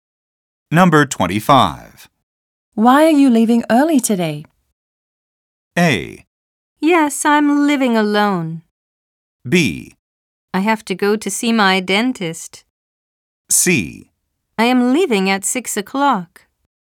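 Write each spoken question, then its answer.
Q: Why are you leaving early today?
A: B: I have to go to see my dentist.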